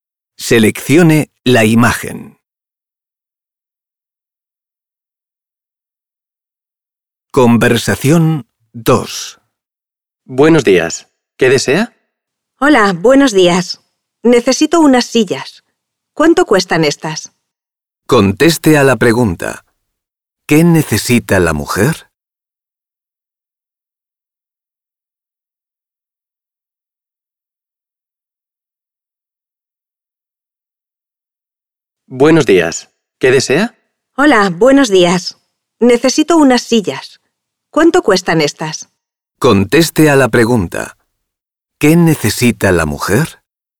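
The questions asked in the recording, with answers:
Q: ¿Qué necesita la mujer?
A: Unas sillas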